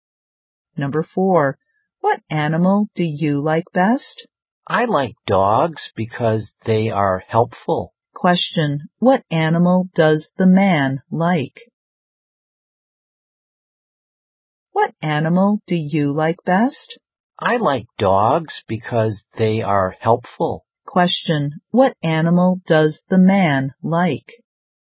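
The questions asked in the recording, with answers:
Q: Question, what animal does the man like?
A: Dogs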